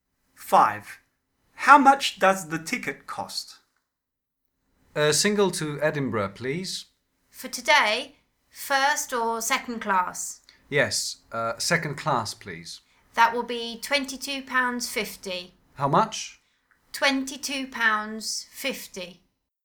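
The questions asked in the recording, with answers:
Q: How much does the ticket cost?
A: £22.50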